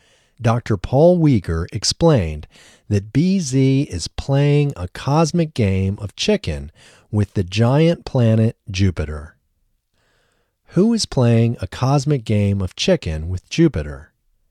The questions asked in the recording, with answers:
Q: Who is playing a cosmic game of chicken with Jupiter?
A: BZ is playing a cosmic game of chicken with Jupiter.